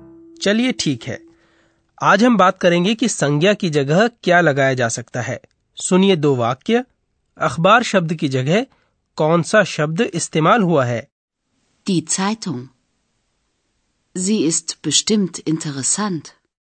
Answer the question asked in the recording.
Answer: शब्द अखबार की जगह सर्वनाम जी लगाया गया है